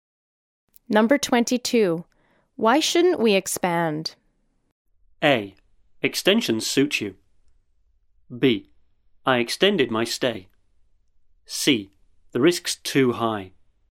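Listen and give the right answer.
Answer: C: The risk's too high.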